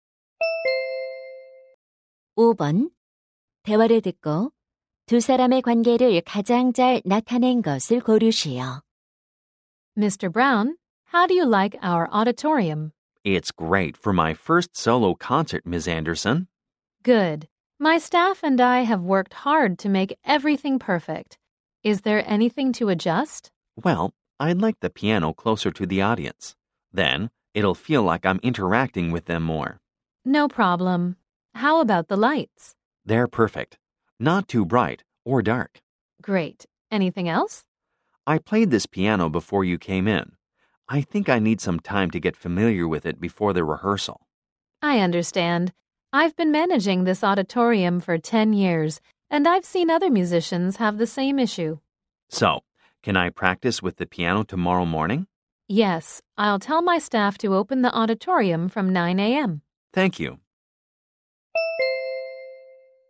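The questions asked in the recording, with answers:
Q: 대화를 듣고 두 사람의 관계를 가장 잘 나타낸 것을 고르시오.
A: 피아니스트 - 공연장 관리자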